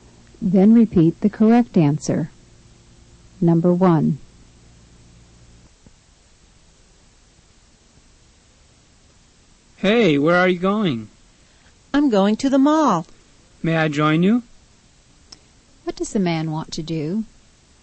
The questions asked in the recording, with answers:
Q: What does the man want to do?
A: He wants to come along with her.